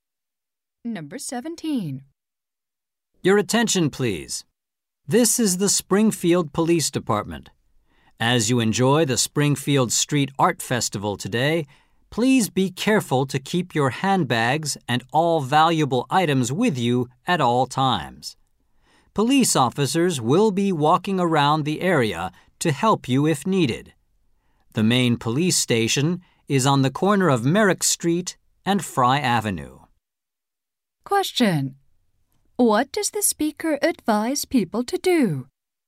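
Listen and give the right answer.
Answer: Keep their handbags and valuables with them at all times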